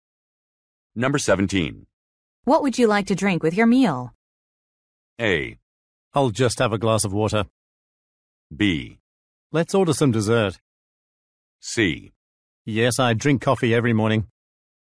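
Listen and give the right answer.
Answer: A: I'll just have a glass of water.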